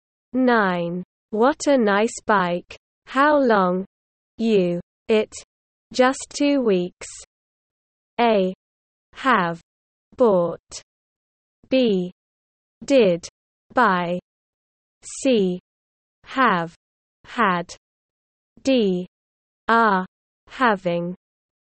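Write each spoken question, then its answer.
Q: What a nice bike. How long? You. It. Just 2 weeks.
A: C: Have, had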